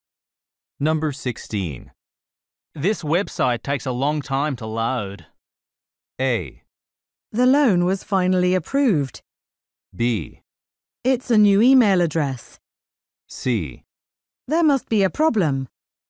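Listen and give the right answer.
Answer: C: There must be a problem.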